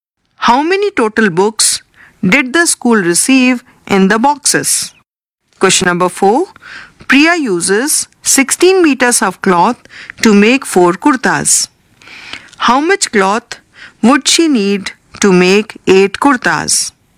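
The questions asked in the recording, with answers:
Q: How much cloth would she need to make 8 kurtas?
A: 32 meters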